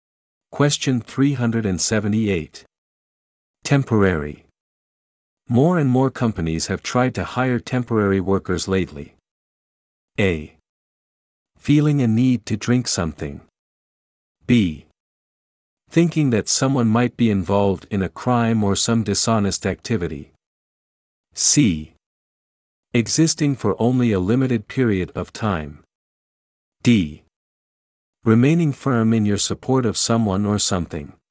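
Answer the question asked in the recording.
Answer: C: Existing for only a limited period of time.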